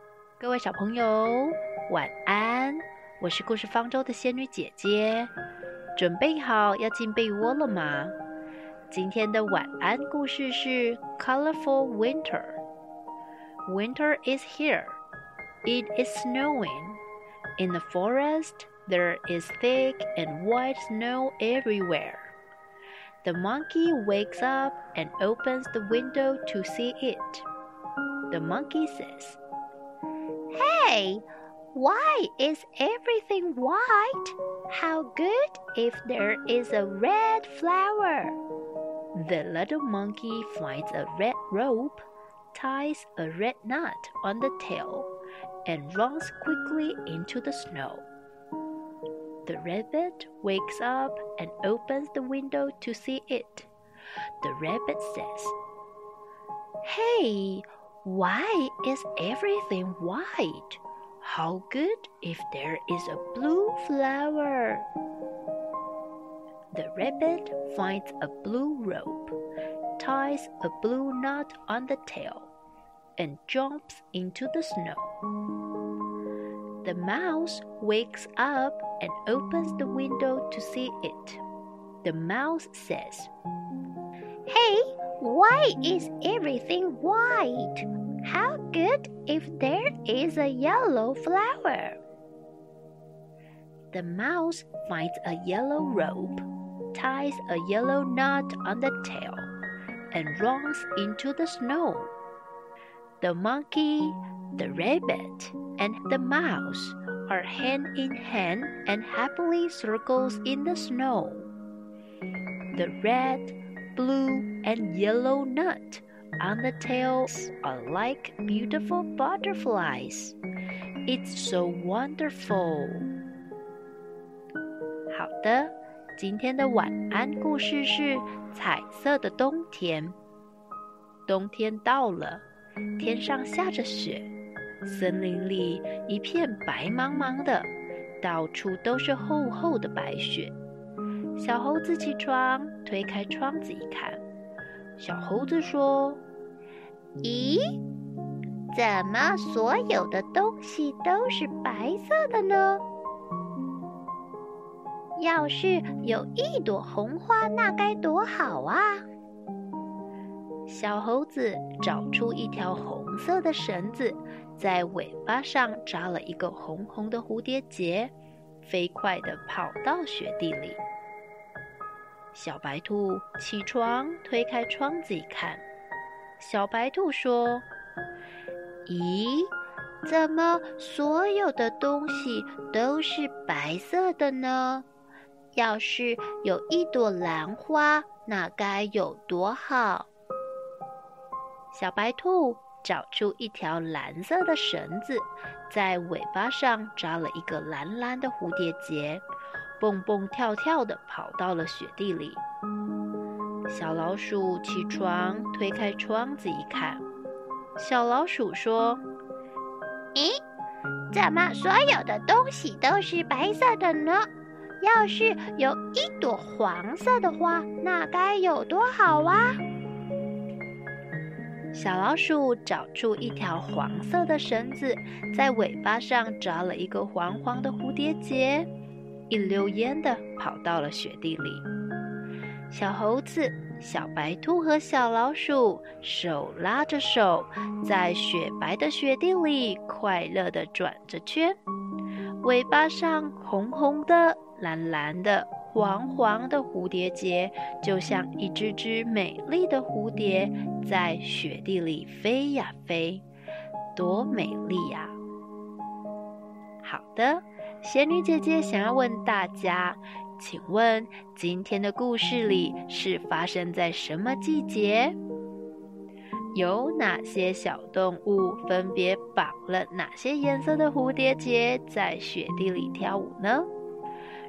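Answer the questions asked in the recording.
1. 冬天
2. 小猴子红色,小白兔蓝色,小老鼠黄色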